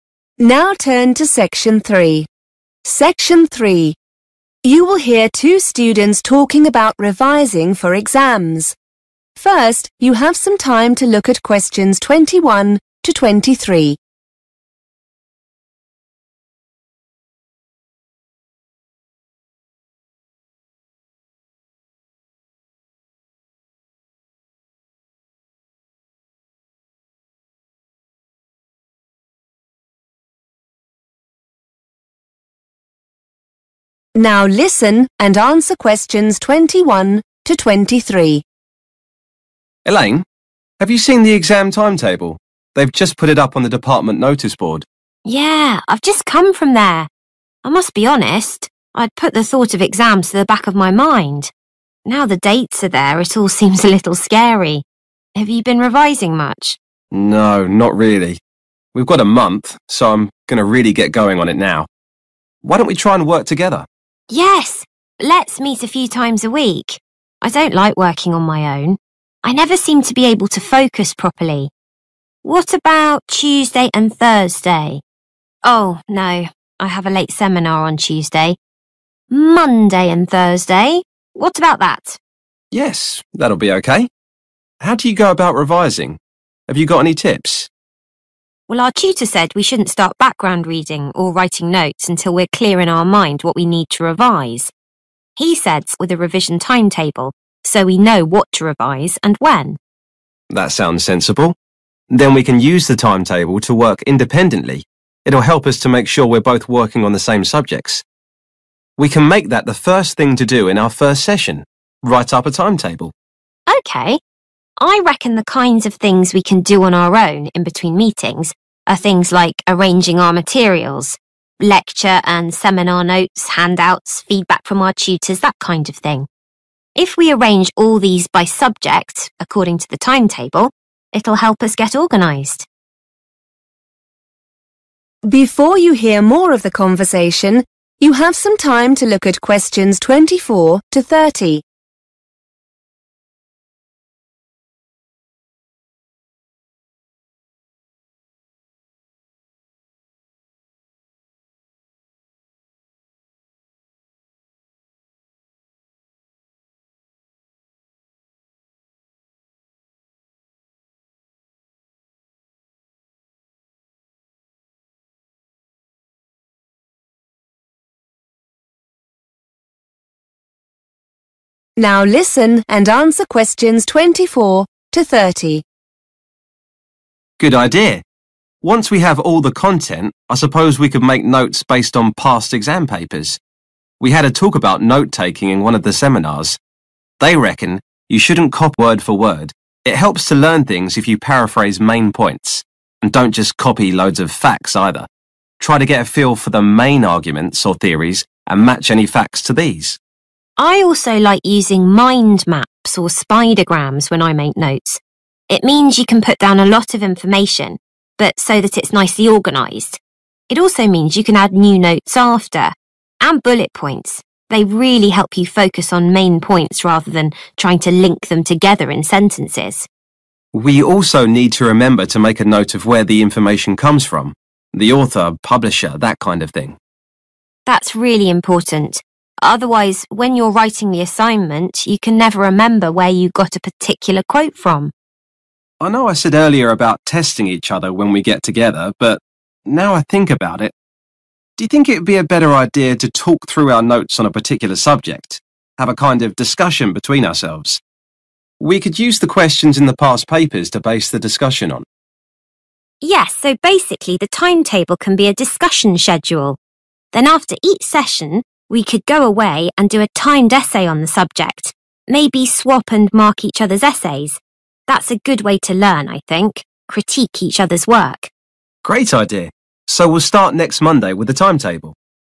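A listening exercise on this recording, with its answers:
Write NO MORE THAN THREE WORDS for each answer.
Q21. When do Elaine and Adam decide to meet for revision?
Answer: Monday and Thursday

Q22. What item does Adam think will help them work independently on revision?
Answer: revision timetable

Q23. How does Elaine suggest they spend their revision time between meetings?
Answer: arranging their materials

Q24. It's best to avoid notes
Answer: word for word

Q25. Relate to key theories and arguments.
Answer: facts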